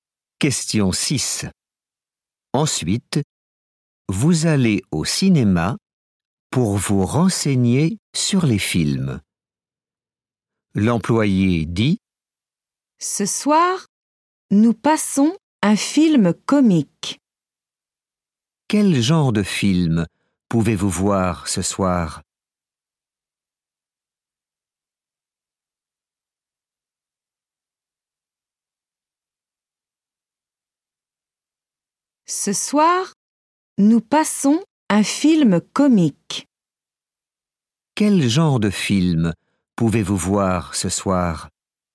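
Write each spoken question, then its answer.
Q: Quel genre de film pouvez-vous voir ce soir?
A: un film comique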